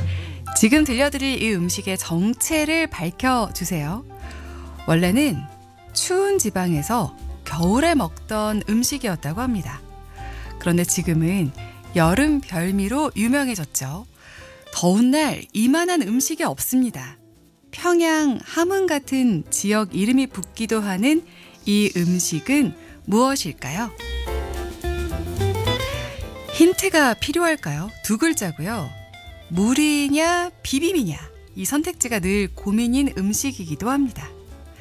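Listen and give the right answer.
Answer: 냉면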